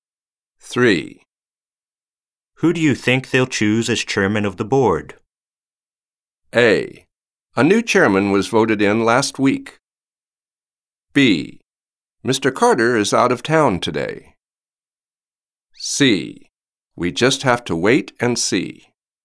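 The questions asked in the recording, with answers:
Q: Who do you think they'll choose as chairman of the board?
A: C: We just have to wait and see.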